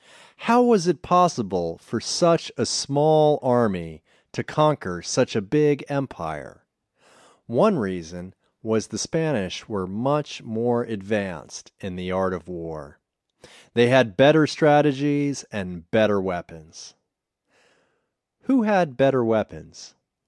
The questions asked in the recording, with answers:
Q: Who had better weapons?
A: The Spanish had better weapons.